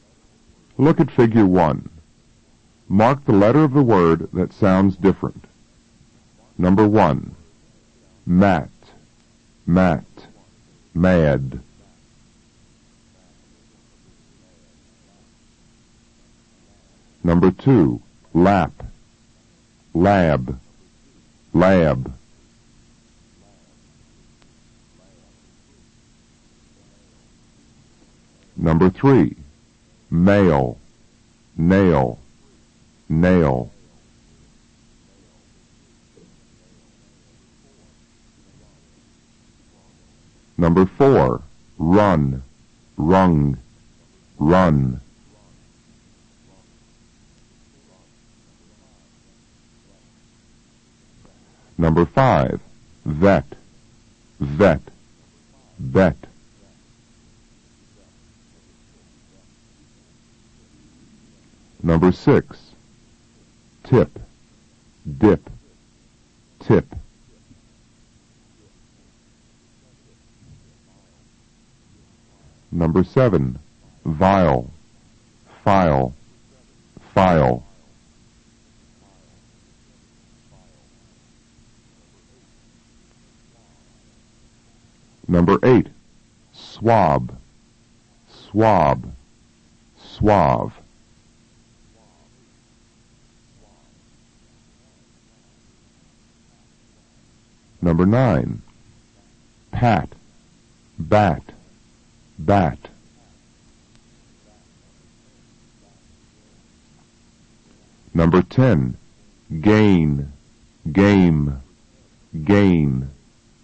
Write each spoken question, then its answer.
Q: Mat. Mat. Mad.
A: Number 1 is C.

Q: Lap. Lab. Lab.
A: Number 2 is A.

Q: Mail. Nail. Nail.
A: Number 3 is A.

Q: Run. Rung. Run.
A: Number 4 is B.

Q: Vet. Vet. Bet.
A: Number 5 is C.

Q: Tip. Dip. Tip.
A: Number 6 is B.

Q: Vile. File. File.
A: Number 7 is A.

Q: Swab. Swab. Suave.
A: Number 8 is C.

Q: Pat. Bat. Bat.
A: Number 9 is A.

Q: Gain. Game. Gain.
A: Number 10 is B.